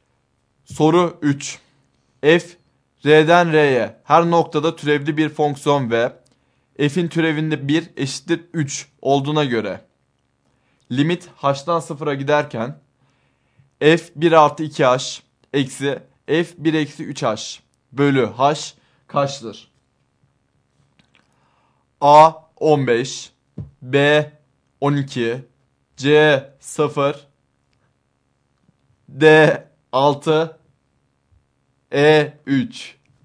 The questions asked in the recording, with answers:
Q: F r'den r'ye her noktada türevli bir fonksiyon ve f'in türevinde 1 eşittir 3 olduğuna göre limit h'dan 0'a giderken f 1 artı 2 h eksi f 1 eksi 3 h bölü h kaçtır?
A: Doğru yanıt A şıkkı.